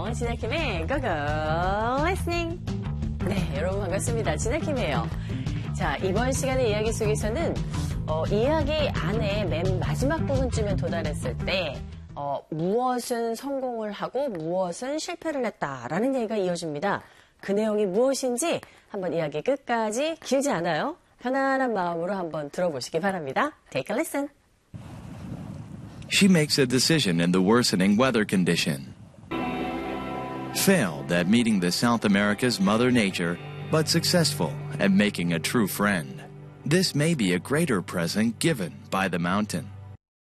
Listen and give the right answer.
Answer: 진정한 친구를 사귄 것에는 성공을 했는데 이 대자연의 만남은 실패를 했다